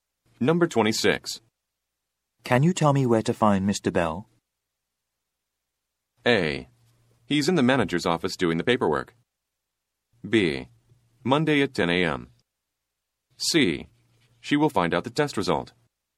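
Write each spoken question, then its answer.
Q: Can you tell me where to find Mr. Bell?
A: A: He's in the manager's office doing the paperwork.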